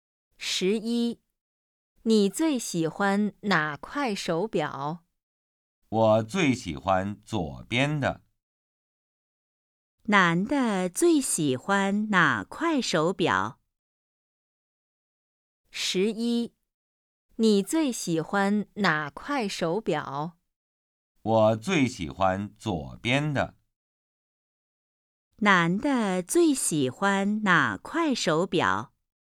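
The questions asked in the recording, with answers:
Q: 男的最喜欢哪块手表?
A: 左边的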